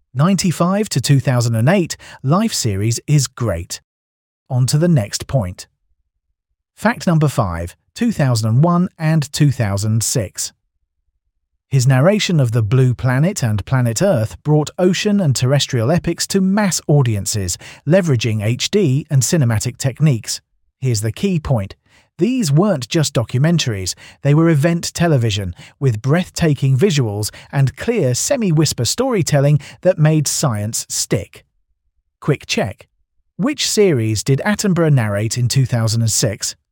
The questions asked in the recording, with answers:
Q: Which series did Attenborough narrate in 2006?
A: Correct answer, Planet Earth.